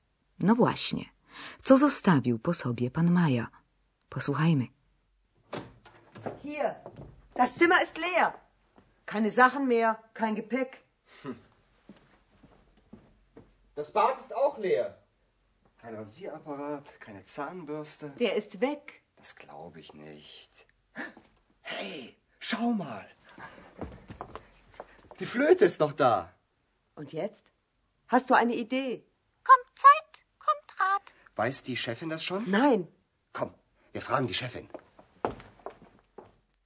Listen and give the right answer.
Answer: Jedynym śladem świadczącym, że ktoś tu mieszkał, jest flet.